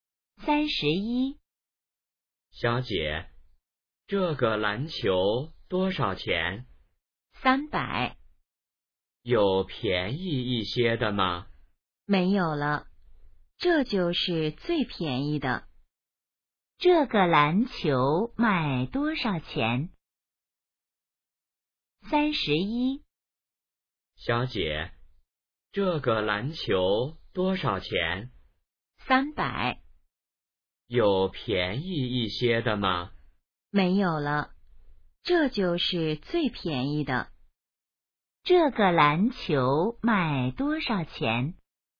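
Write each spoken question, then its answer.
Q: 这个篮球卖多少钱?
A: 300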